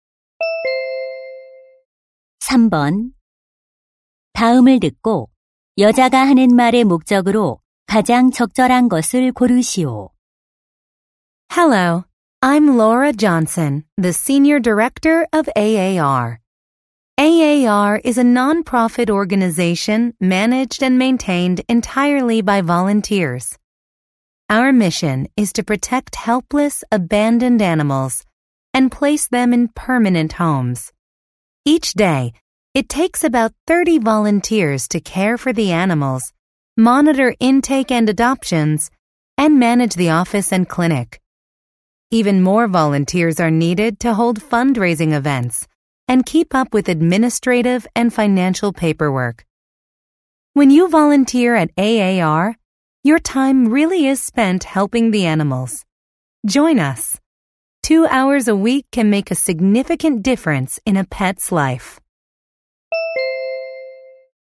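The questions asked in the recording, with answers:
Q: 다음을 듣고 여자가 하는 말의 목적으로 가장 적절한 것을 고르시오.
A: 동물 보호 단체 자원봉사자 모집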